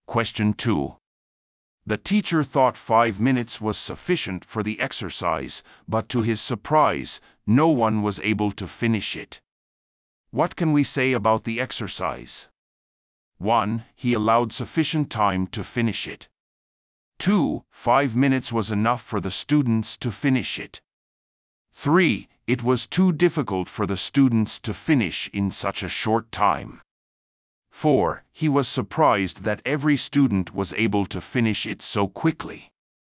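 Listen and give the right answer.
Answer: 3: It was too difficult for the students to finish in such a short time.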